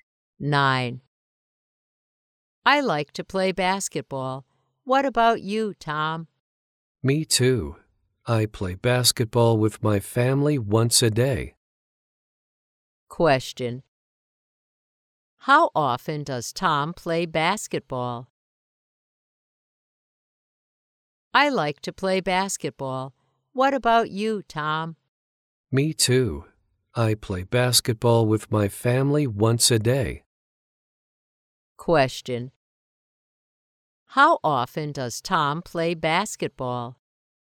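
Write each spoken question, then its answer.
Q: How often does Tom play basketball?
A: Once a day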